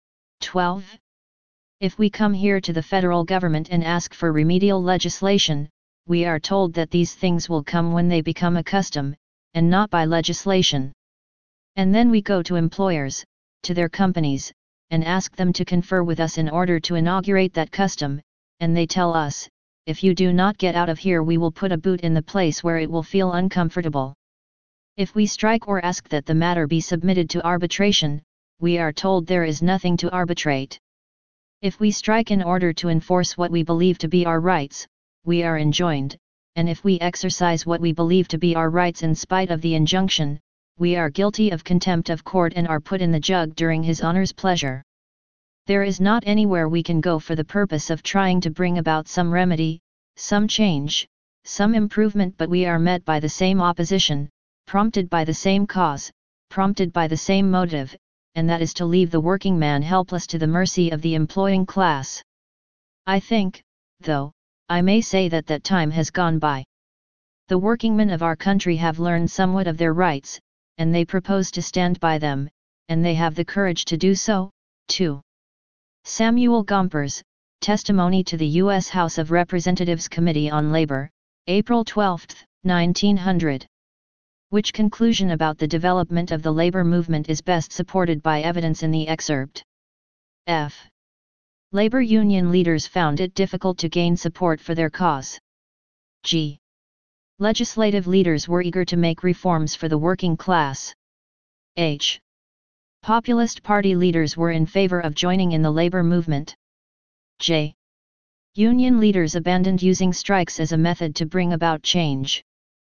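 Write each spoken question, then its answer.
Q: Which conclusion about the development of the labor movement is best supported by evidence in the excerpt?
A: F: Labor union leaders found it difficult to gain support for their cause.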